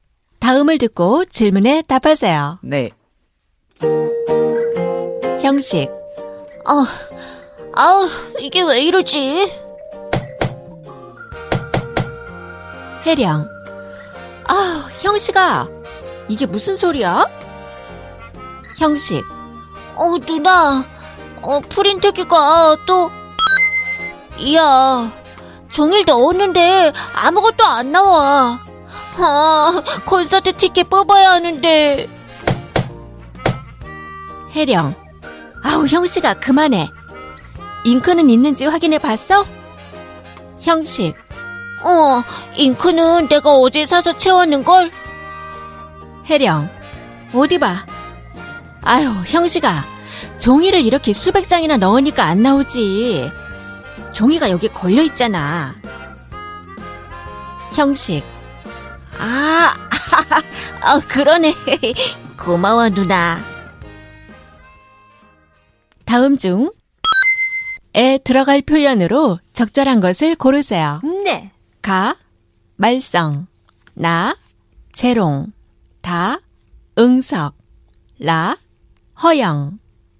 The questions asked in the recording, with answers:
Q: 다음 중에 들어갈 표현으로 적절한 것을 고르세요.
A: The answer is, why do you cause so much 말썽?